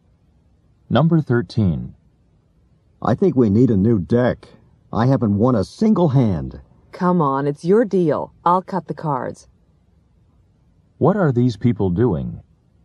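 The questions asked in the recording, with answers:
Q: What are these people doing?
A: Playing cards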